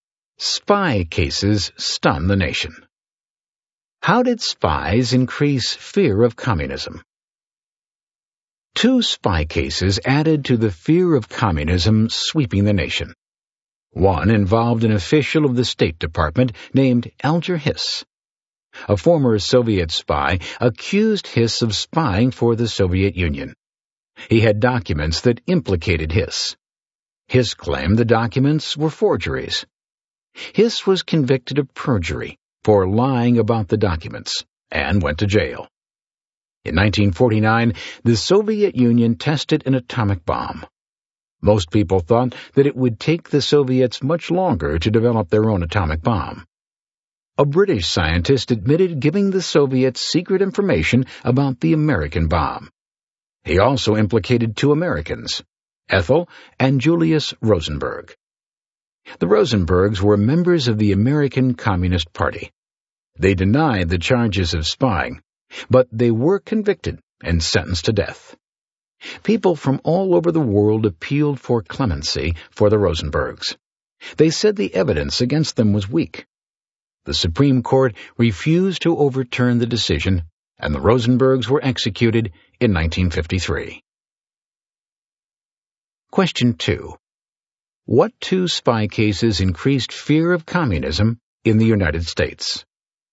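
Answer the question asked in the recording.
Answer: The Alger Hiss case and the Rosenberg case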